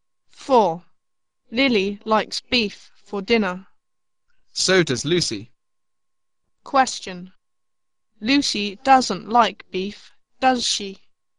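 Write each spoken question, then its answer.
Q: Lucy doesn't like beef, does she?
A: Yes, she does.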